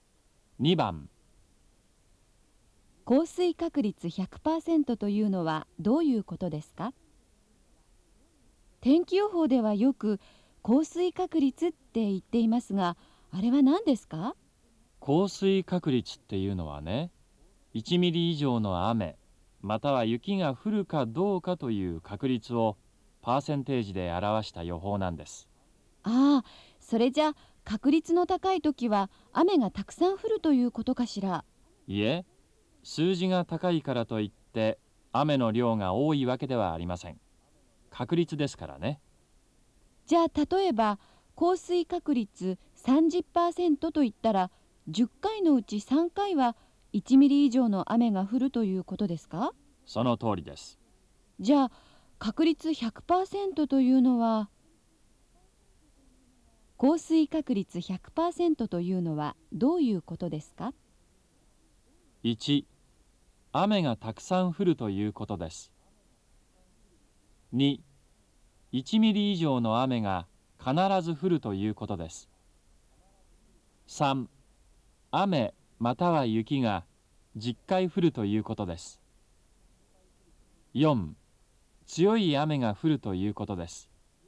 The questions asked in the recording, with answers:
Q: 降水確率 100% というのはどういうことですか?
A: 2番、2